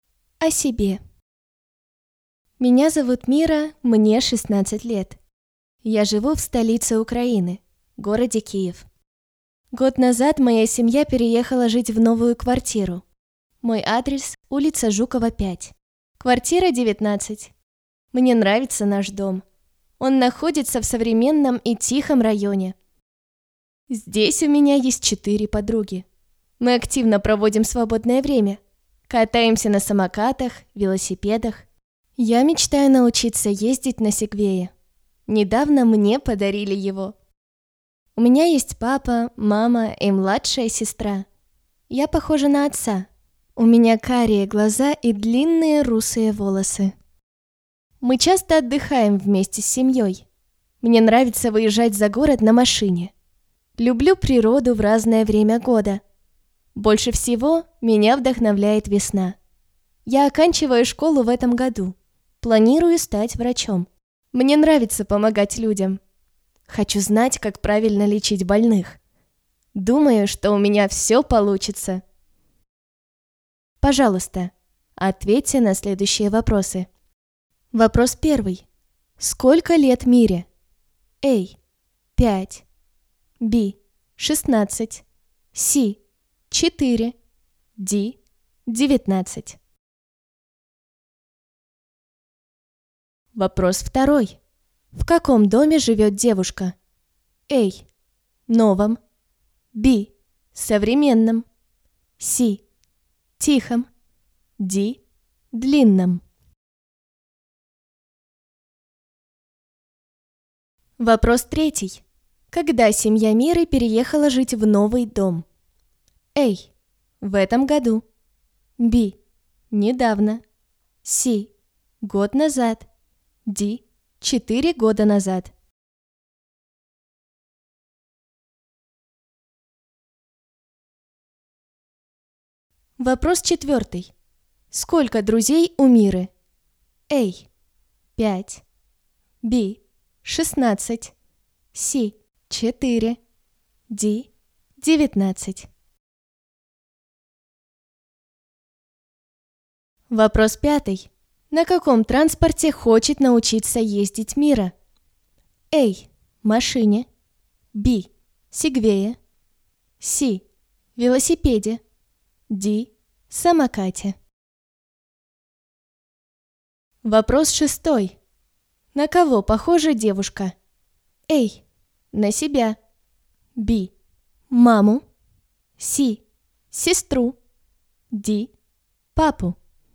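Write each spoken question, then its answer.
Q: Сколько лет Мире?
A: B: 16

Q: Когда семья Миры переехала жить в новый дом?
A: C: Год назад

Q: Сколько друзей у Миры?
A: C: 4

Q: На каком транспорте хочет научиться ездить Мира?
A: B: Сегвее

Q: На кого похожа девушка?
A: Д: Папу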